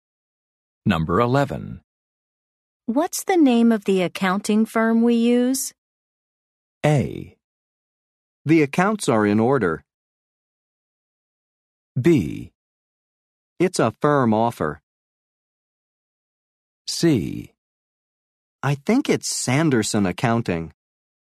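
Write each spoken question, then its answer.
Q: What's the name of the accounting firm we use?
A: C: I think it's Sanderson Accounting.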